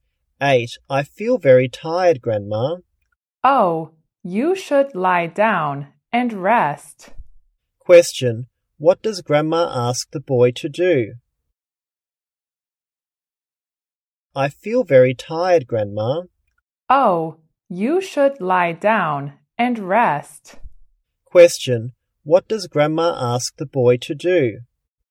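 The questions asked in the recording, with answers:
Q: what does Grandma ask the boy to do?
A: Lie down and rest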